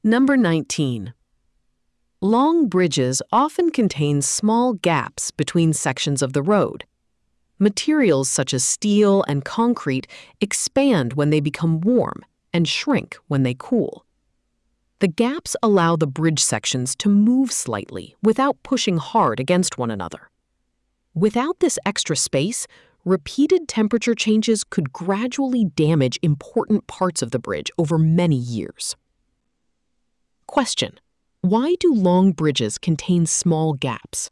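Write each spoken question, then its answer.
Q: why do long bridges contain small gaps?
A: To let the bridge sections expand and shrink with temperature changes without pushing against each other and damaging the bridge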